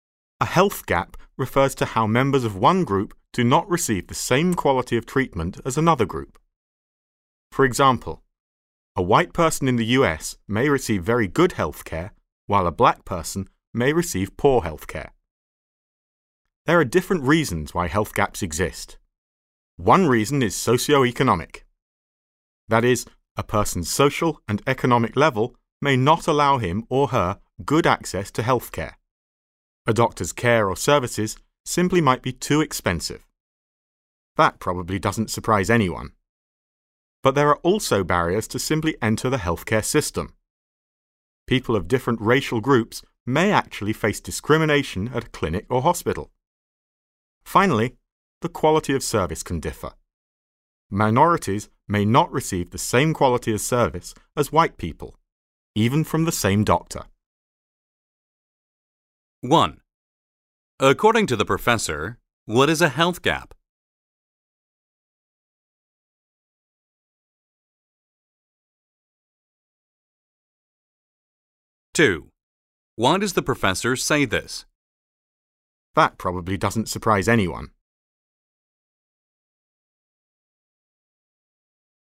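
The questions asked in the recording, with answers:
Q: According to the professor, what is a health gap?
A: When members of one group do not receive the same quality of treatment as another group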